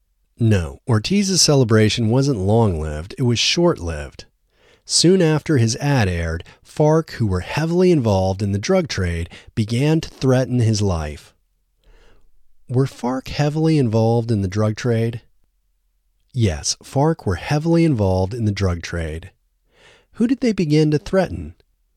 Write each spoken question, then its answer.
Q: Who did they begin to threaten?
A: They began to threaten Ortiz.